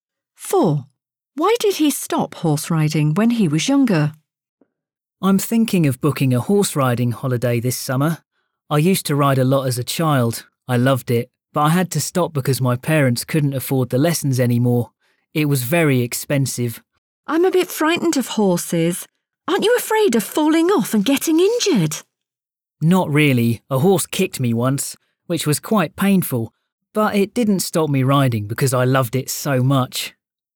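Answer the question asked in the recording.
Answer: His parents couldn't afford the lessons anymore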